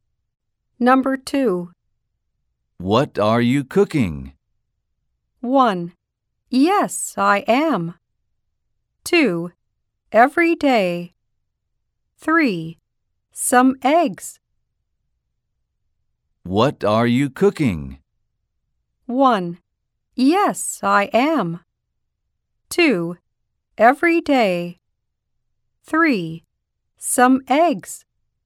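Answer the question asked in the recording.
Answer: 3: Some eggs.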